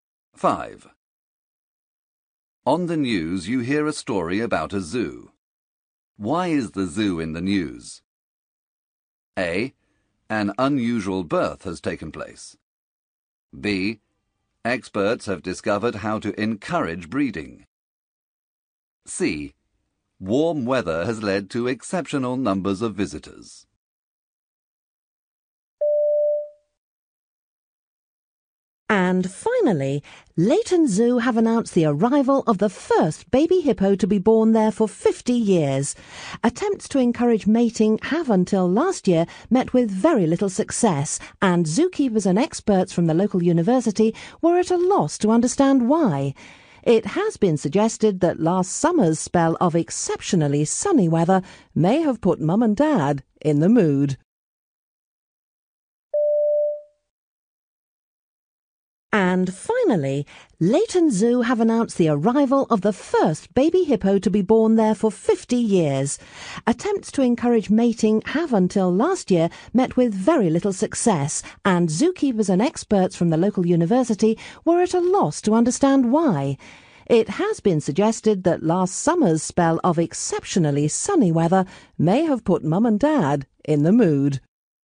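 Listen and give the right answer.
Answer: A: An unusual birth has taken place.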